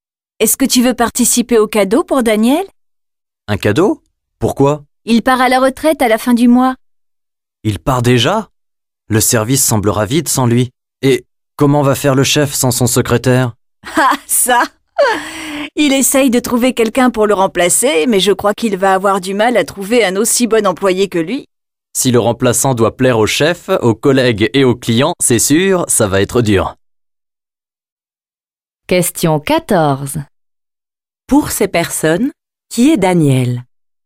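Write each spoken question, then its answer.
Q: Pour ces personnes, qui est Daniel ?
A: Un collègue, le secrétaire du chef, qui part à la retraite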